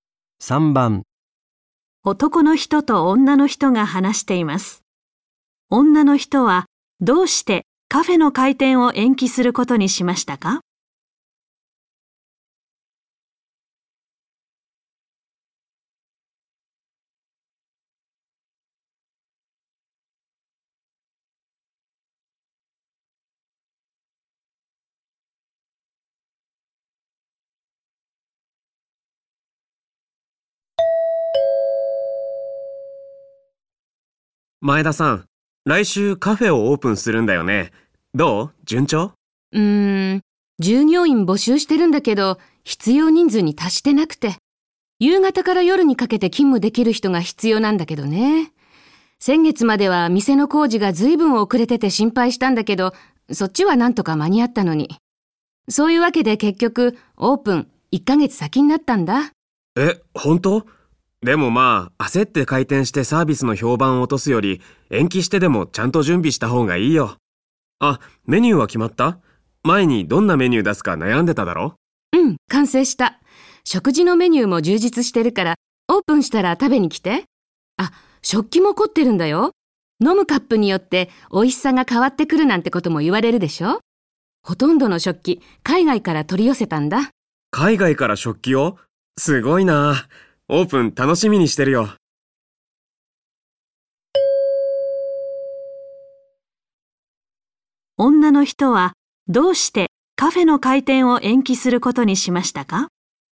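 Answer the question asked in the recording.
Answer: 従業員が必要人数に達していないから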